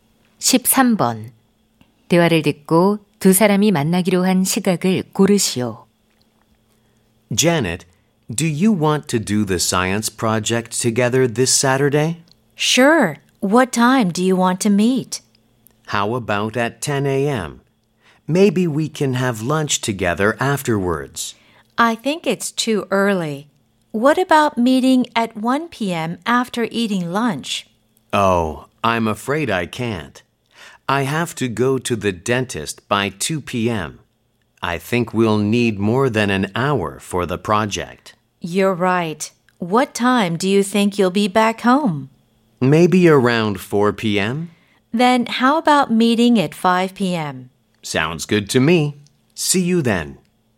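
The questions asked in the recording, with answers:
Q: 대화를 듣고 두 사람이 만나기로 한 시각을 고르시오.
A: 오후 5시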